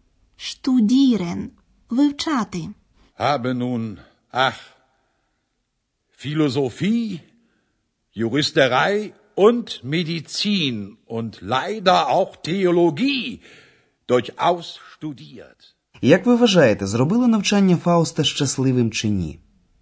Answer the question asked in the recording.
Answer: Фауст був нещасним, і це його «ах» було зітханням.